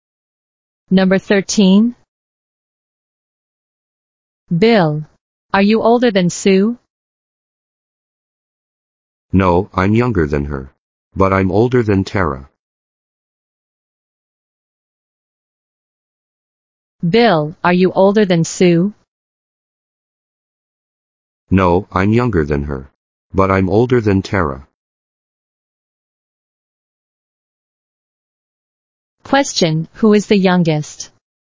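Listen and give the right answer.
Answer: Tara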